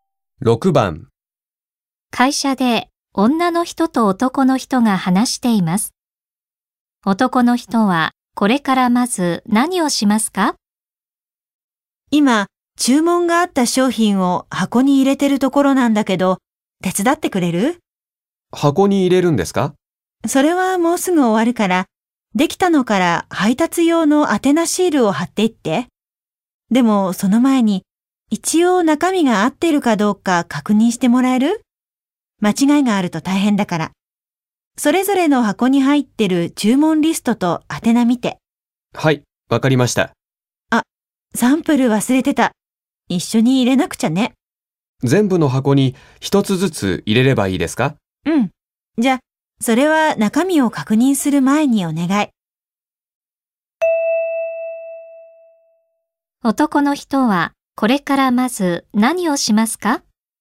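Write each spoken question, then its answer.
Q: 男の人はこれからまず何をしますか?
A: 全部の箱にサンプルを一つずつ入れる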